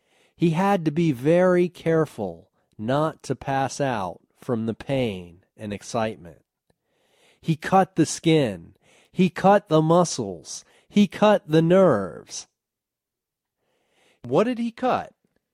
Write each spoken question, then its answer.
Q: What did he cut?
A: He cut the skin, the muscles, and the nerves.